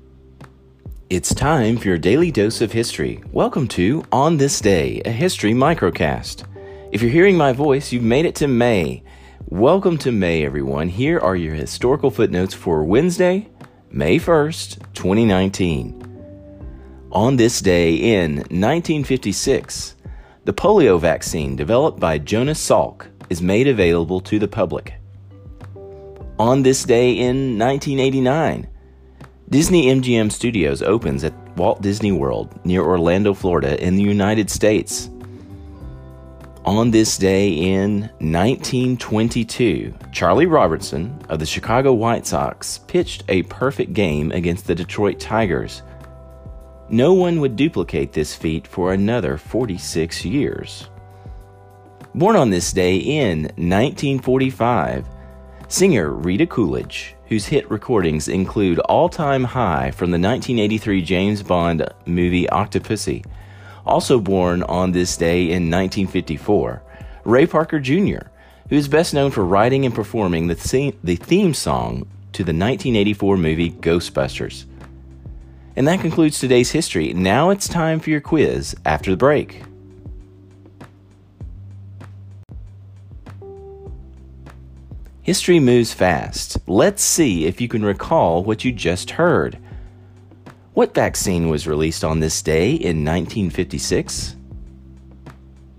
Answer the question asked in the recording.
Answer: the polio vaccine.